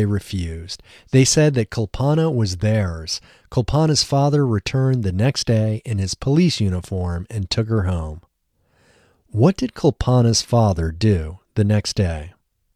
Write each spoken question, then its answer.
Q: What did Kulpana's father do the next day?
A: The next day, Kulpana's father returned in his police uniform and took her home.